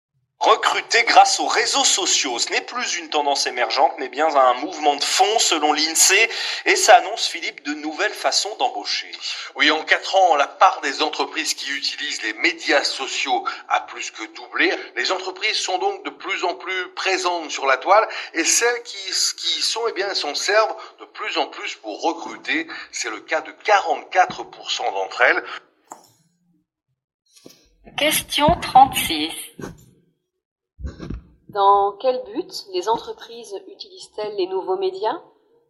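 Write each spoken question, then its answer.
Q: Dans quel but les entreprises utilisent-elles les nouveaux médias?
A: Pour recruter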